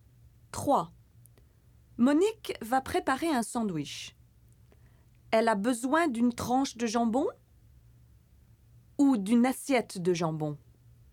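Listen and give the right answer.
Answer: une tranche de jambon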